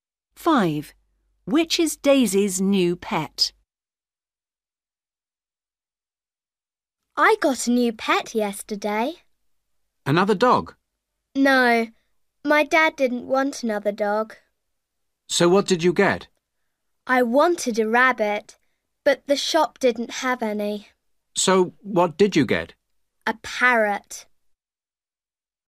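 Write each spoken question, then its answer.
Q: Which is Daisy's new pet?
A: a parrot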